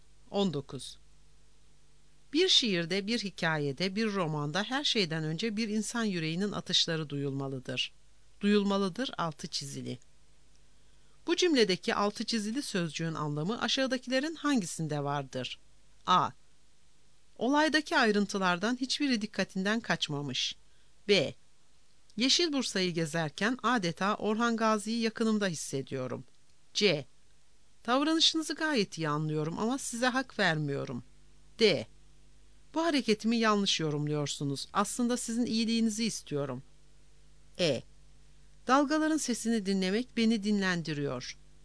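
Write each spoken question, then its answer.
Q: Bu cümledeki altı çizili sözcüğün anlamı aşağıdakilerin hangisinde vardır?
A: B: Yeşil Bursa'yı gezerken adeta Orhan Gazi'yi yakınımda hissediyorum.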